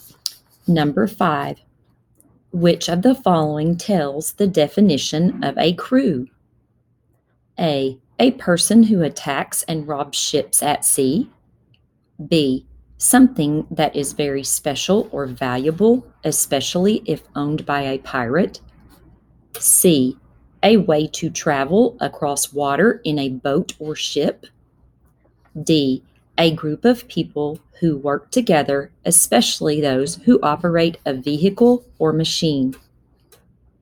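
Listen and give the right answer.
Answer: D: A group of people who work together, especially those who operate a vehicle or machine.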